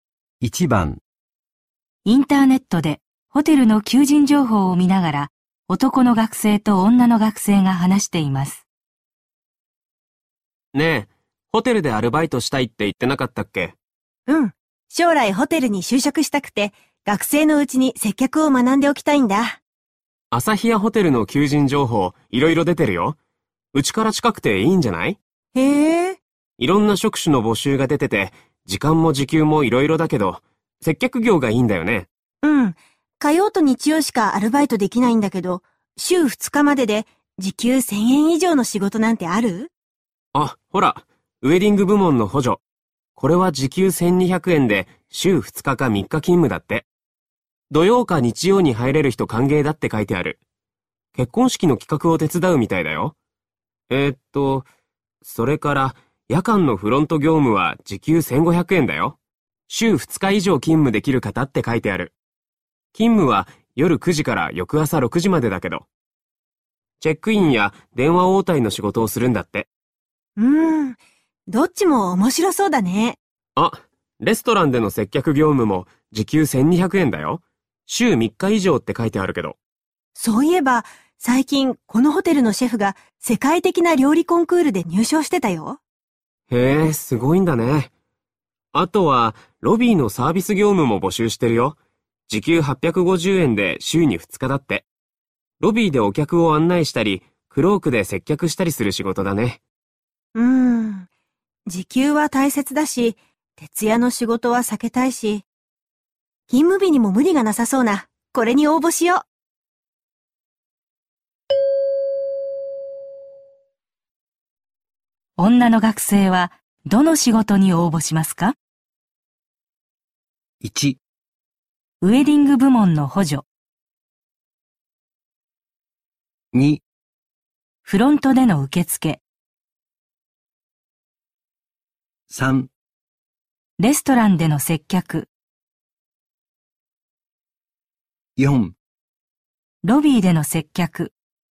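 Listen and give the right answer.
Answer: 1: ウェディング部門の補助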